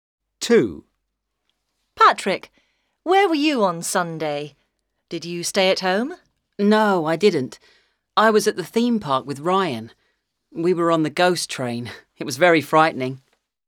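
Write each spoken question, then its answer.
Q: Patrick, where were you on Sunday?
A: At the theme park with Ryan.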